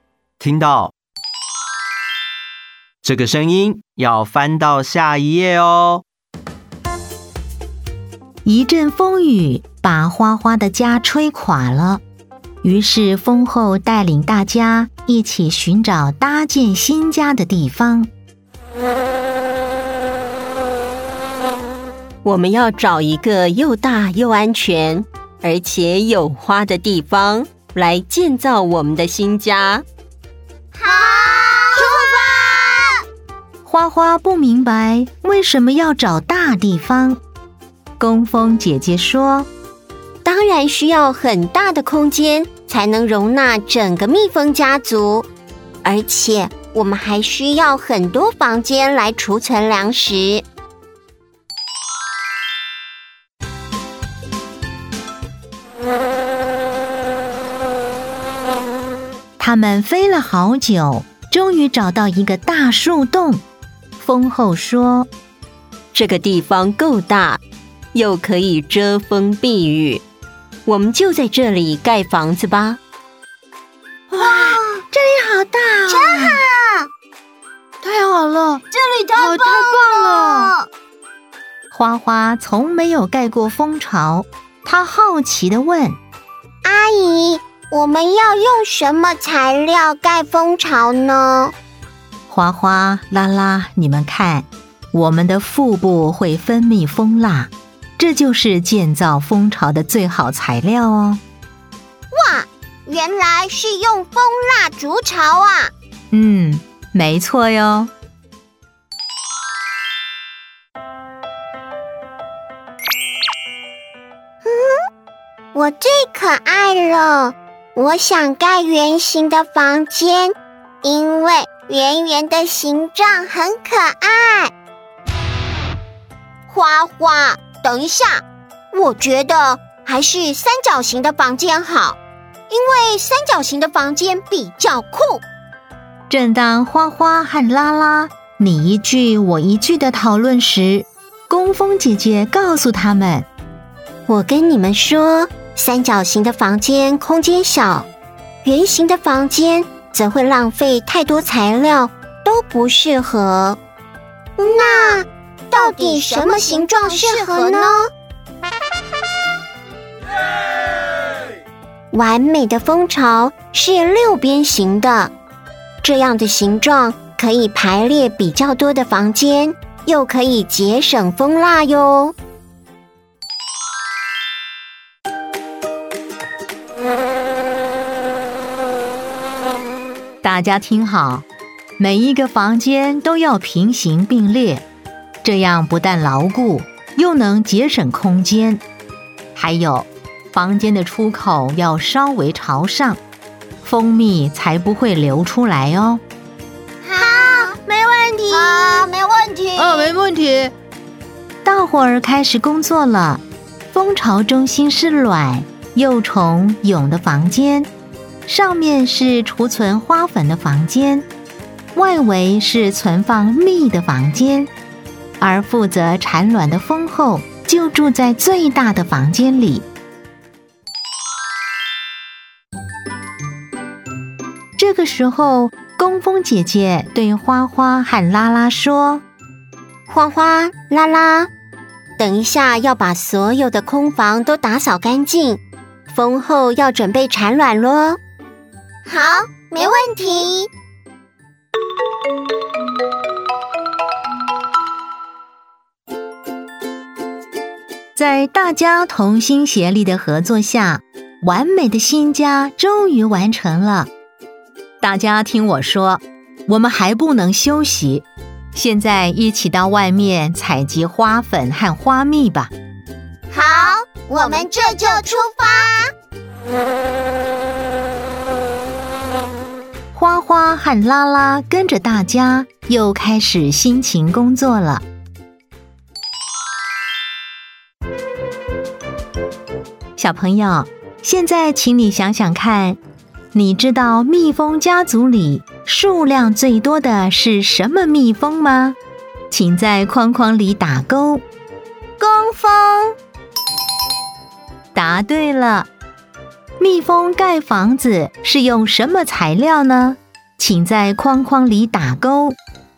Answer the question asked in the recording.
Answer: 蜂蜡。